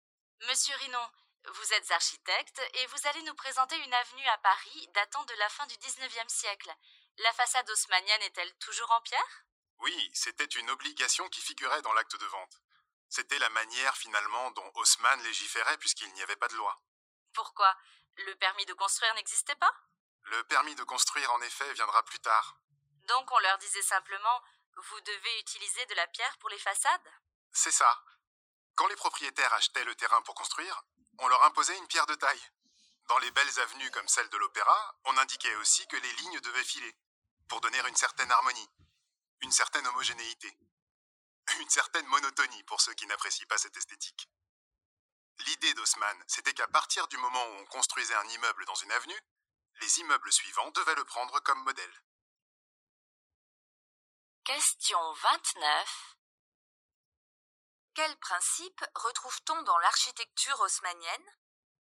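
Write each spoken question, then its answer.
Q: Quels principes retrouve-t-on dans l'architecture haussmannienne ?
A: Des façades obligatoirement en pierre de taille, des lignes qui se suivent pour donner harmonie et homogénéité, et chaque nouvel immeuble qui prend le précédent comme modèle.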